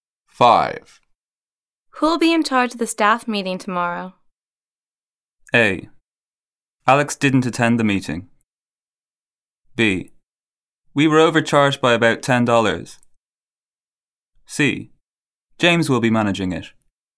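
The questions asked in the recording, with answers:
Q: Who'll be in charge of the staff meeting tomorrow?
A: C: James will be managing it.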